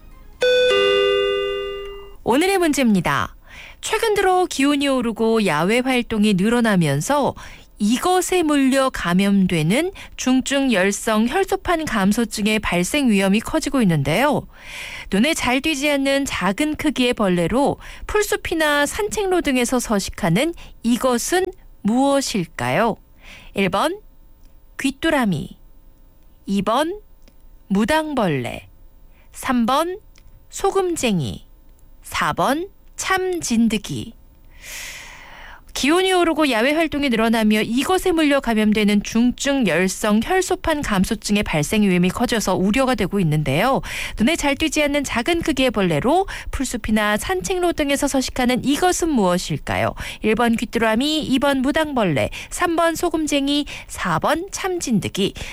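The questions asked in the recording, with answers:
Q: 눈에 잘 띄지 않는 작은 크기의 벌레로 풀숲이나 산책로 등에서 서식하는 이것은 무엇일까요?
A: 4: 참진드기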